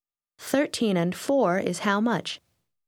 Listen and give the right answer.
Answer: 17.